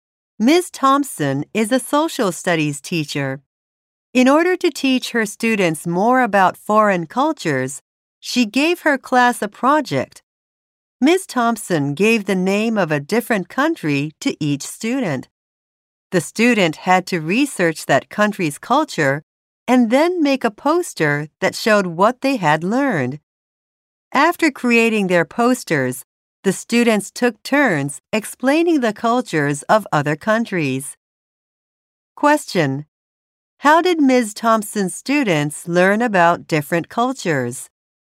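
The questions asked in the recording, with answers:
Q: How did Ms. Thompson's students learn about different cultures?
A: By researching a country and making and explaining posters.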